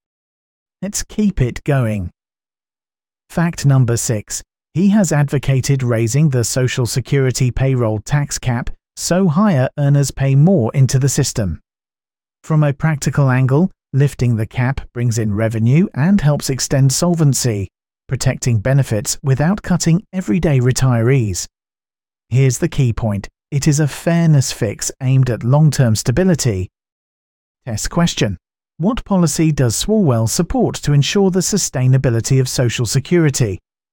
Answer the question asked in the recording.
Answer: Raising the payroll tax cap.